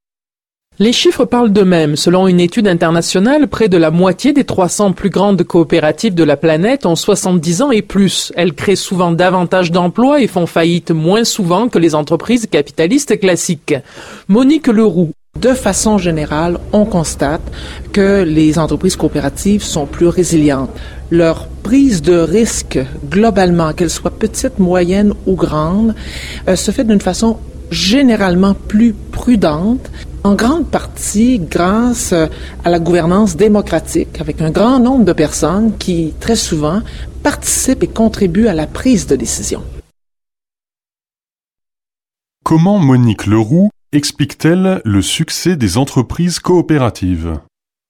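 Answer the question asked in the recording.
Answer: Par leur gouvernance démocratique : beaucoup de personnes participent à la prise de décision, ce qui rend leur prise de risque plus prudente.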